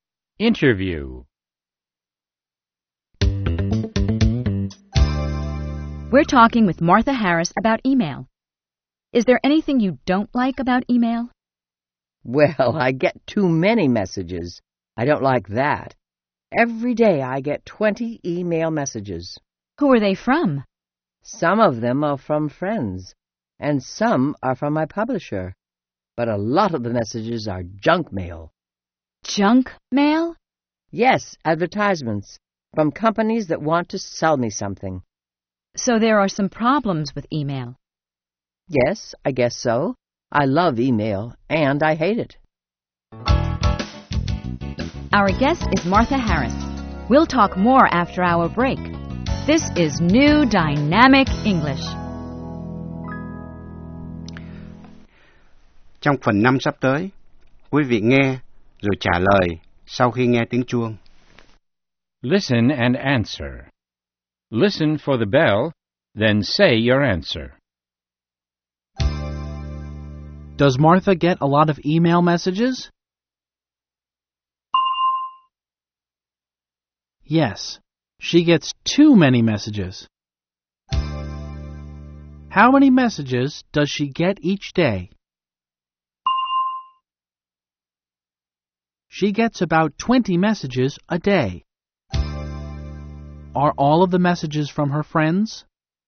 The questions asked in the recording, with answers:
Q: Does Martha get a lot of email messages?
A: Yes, she gets too many messages.

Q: Are all of the messages from her friends?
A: No, they aren't. Some of them are from her publisher, and many of them are junk mail.